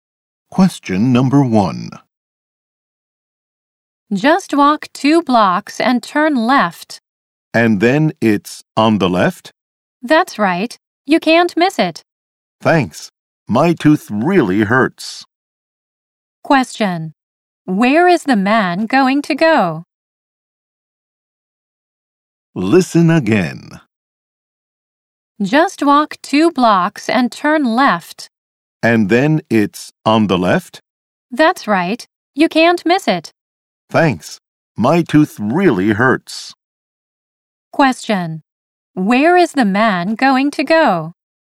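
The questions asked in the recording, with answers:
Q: Where is the man going to go?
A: To the dentist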